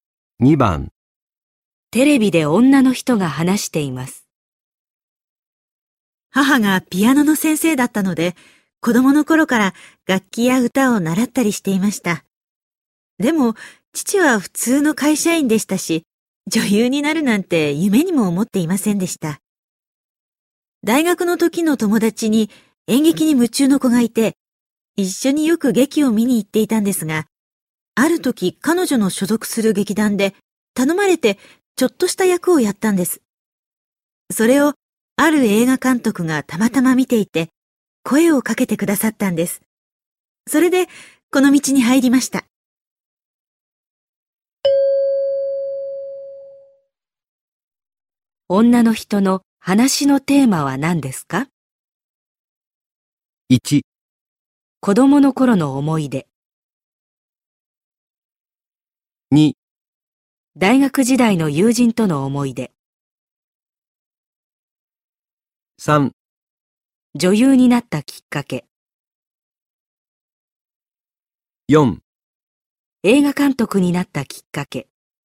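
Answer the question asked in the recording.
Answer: 3: 女優になったきっかけ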